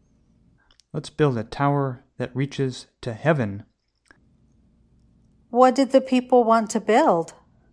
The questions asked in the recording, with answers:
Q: What did the people want to build?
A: The people wanted to build a tower.